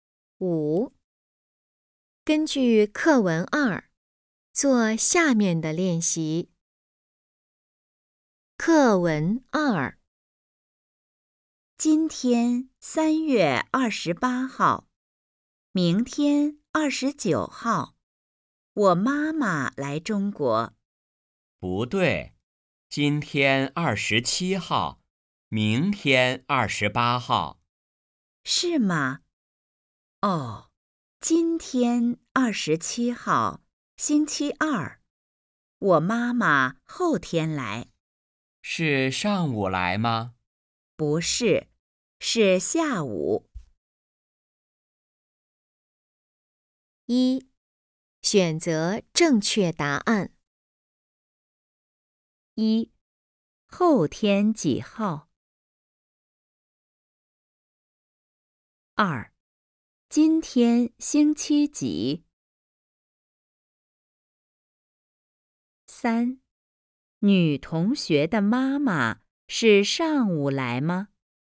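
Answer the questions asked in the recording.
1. 29号
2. 星期二
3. 不是,是下午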